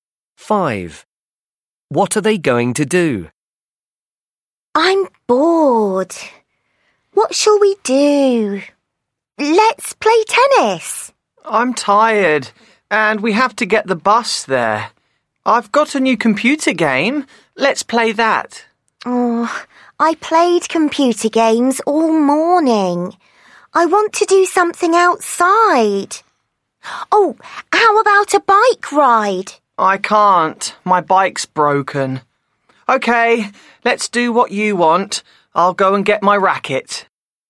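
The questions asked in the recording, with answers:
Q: What are they going to do?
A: play tennis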